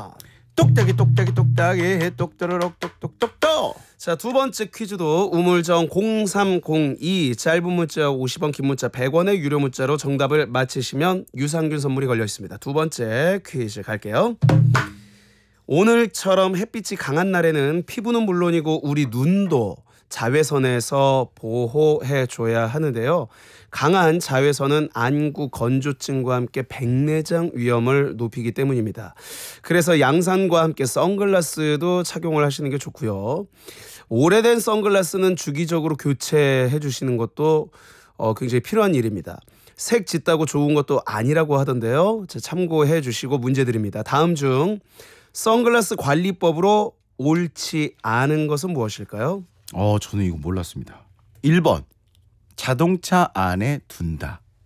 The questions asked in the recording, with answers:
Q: 다음 중 선글라스 관리법으로 옳지 않은 것은 무엇일까요?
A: 정답은 1번이었습니다.